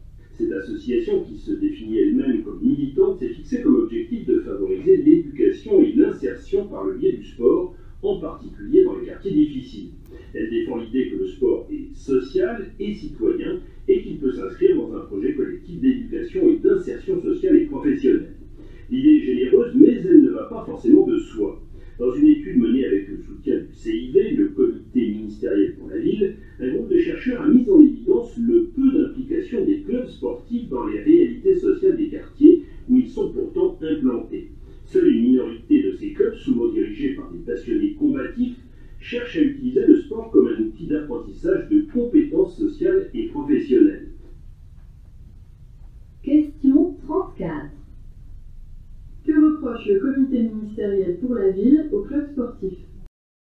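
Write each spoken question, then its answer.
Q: Que reproche le comité ministériel pour la ville aux clubs sportifs ?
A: Leur faible implication dans les réalités sociales des quartiers où ils sont implantés.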